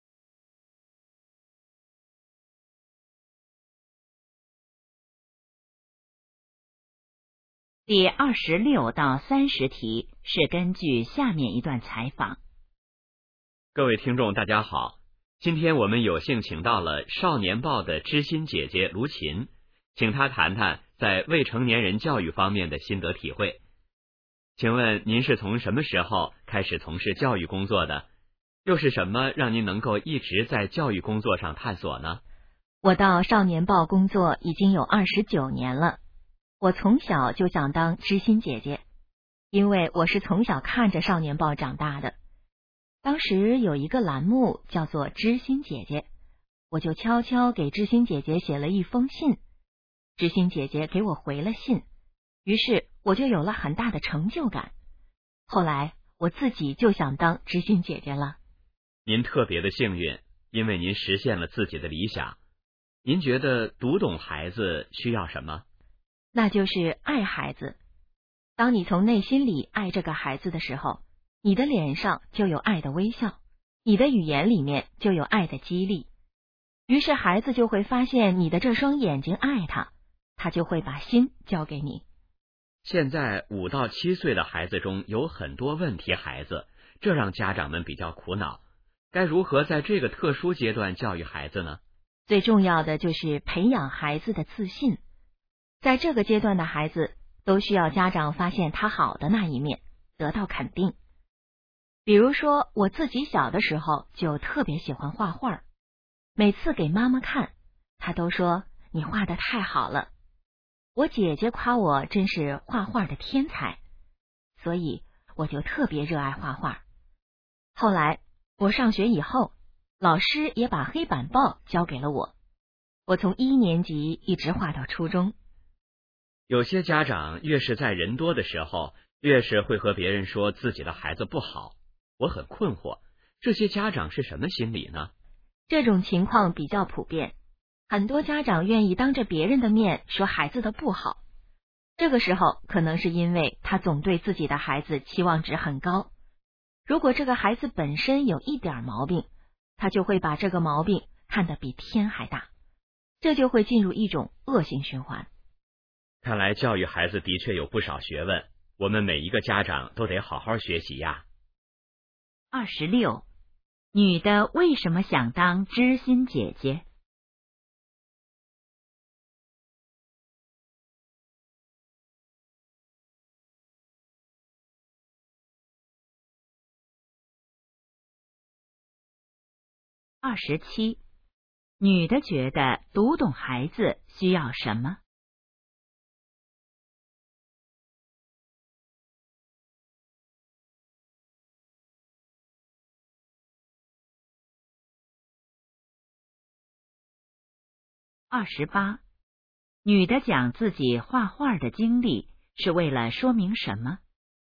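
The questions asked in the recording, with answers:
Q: 女的为什么想当知心姐姐?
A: 小时候给知心姐姐写信得到回信,有很大成就感

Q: 女的觉得读懂孩子需要什么?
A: 爱孩子

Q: 女的讲自己画画的经历是为了说明什么?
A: 要培养孩子的自信,肯定孩子

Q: 为什么有些家长当着别人的面批评孩子?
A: 对孩子期望值太高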